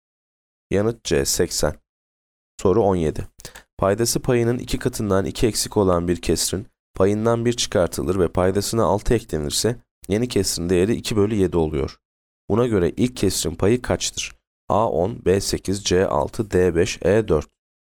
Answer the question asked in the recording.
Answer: Yanıt D 5.